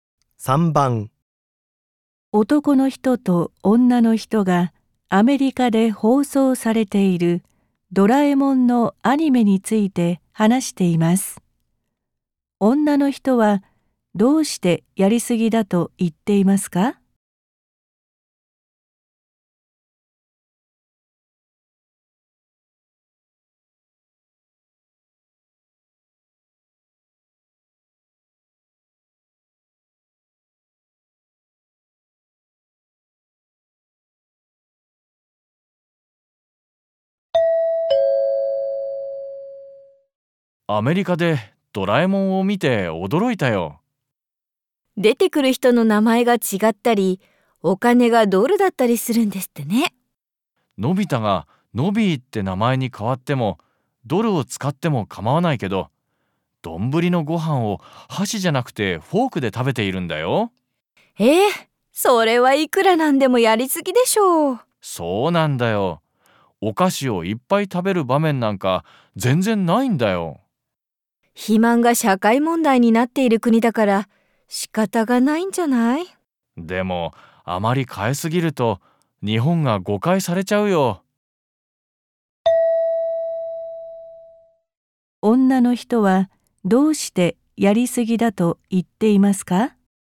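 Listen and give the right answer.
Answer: どんぶりのご飯を箸ではなくフォークで食べているから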